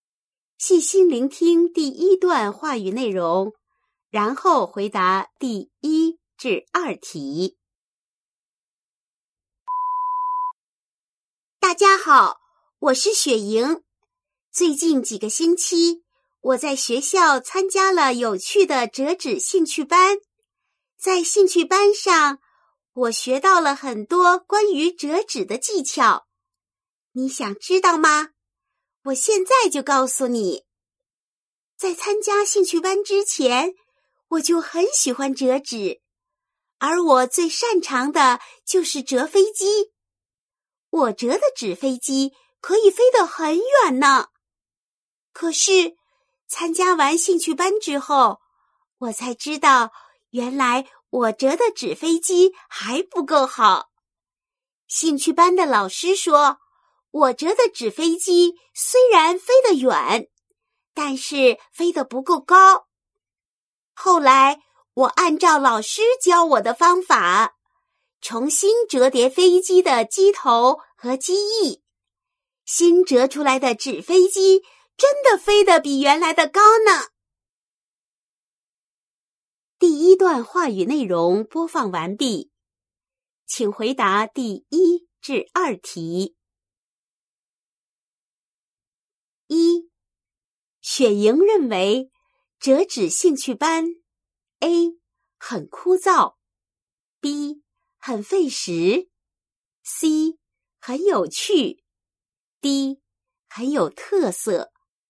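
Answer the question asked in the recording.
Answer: C: 很有趣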